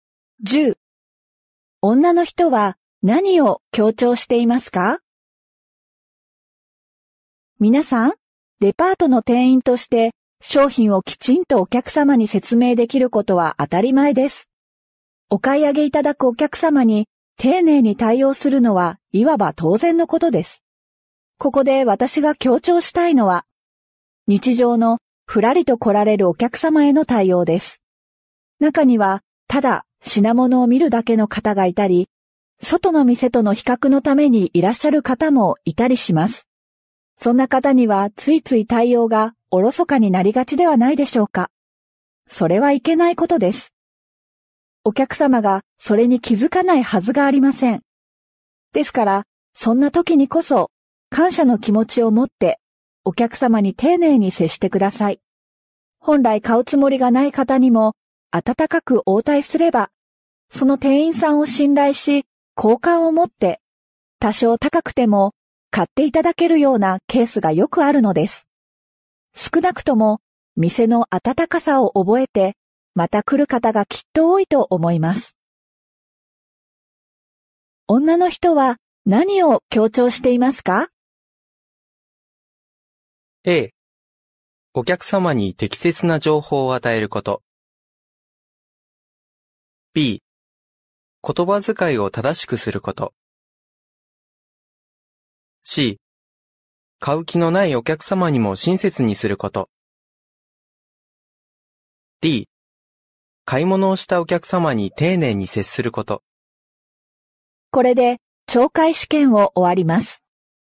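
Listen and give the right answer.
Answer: C: 買う気のないお客様にも親切にすること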